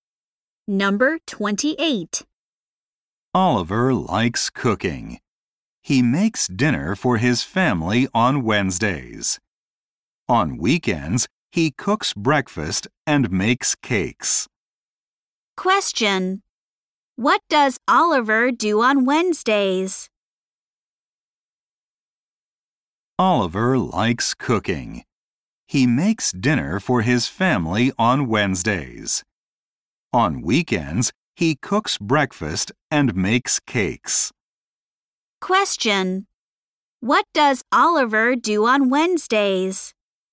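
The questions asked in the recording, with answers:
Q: What does Oliver do on Wednesdays?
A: He makes dinner for his family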